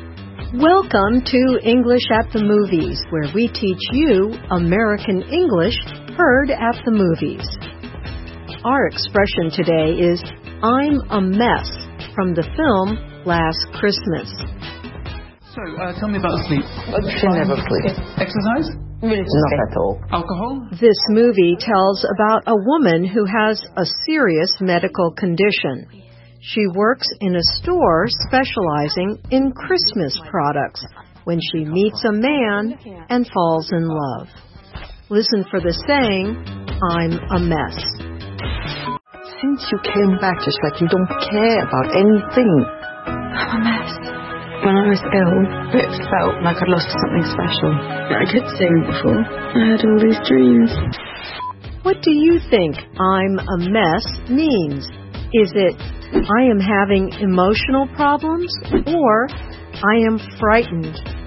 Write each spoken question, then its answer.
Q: What do you think I'm a mess means?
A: I'm a mess means A, I am having emotional problems.